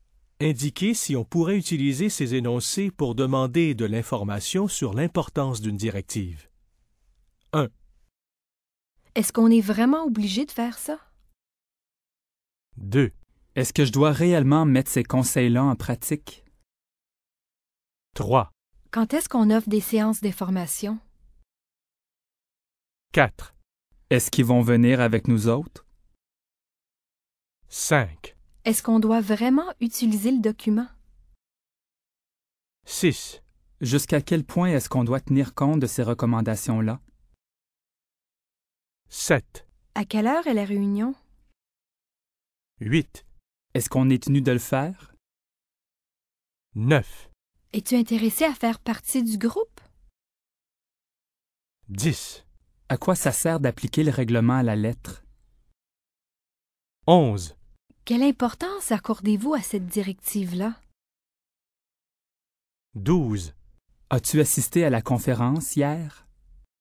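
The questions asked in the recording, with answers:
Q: Est-ce qu'on est vraiment obligé de faire ça?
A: oui

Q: Est-ce que je dois réellement mettre ces conseils-là en pratique?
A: oui

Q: Quand est-ce qu'on offre des séances d'information?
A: non

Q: Est-ce qu'ils vont venir avec nous autres?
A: non

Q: Est-ce qu'on doit vraiment utiliser le document?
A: oui

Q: Jusqu'à quel point est-ce qu'on doit tenir compte de ces recommandations-là?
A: oui

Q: À quelle heure est la réunion?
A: non

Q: Est-ce qu'on est tenu de le faire?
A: oui

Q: Es-tu intéressé à faire partie du groupe?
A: non

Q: Quelle importance accordez-vous à cette directive-là?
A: oui

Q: As-tu assisté à la conférence hier?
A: non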